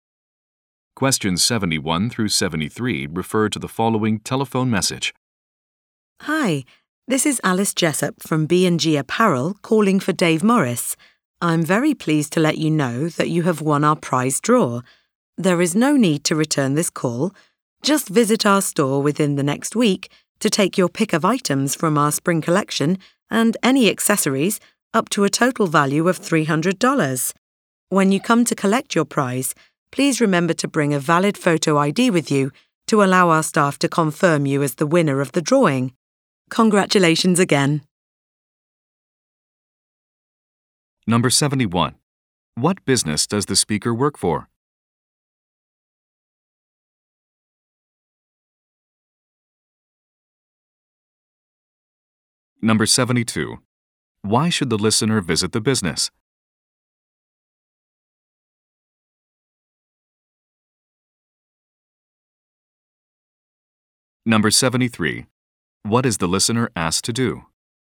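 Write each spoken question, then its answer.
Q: What business does the speaker work for?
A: A clothing store

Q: Why should the listener visit the business?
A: To collect a prize

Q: What is the listener asked to do?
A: Bring a valid photo ID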